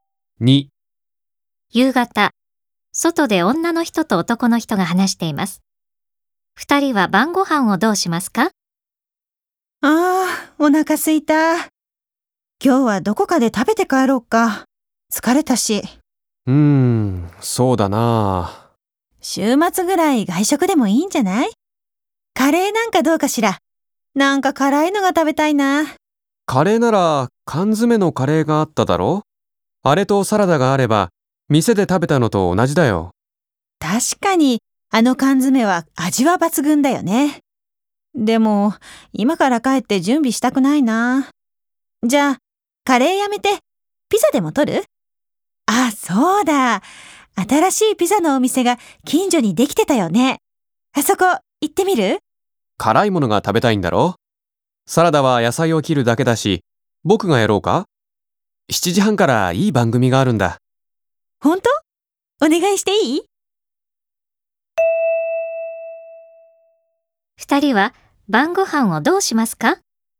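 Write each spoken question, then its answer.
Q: 二人は晩ご飯をどうしますか?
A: 家に帰って、缶詰のカレーとサラダを食べる(サラダは男の人が作る)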